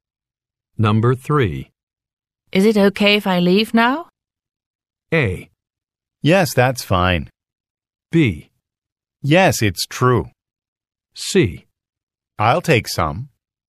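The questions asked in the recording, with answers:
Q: Is it okay if I leave now?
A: A: Yes, that's fine.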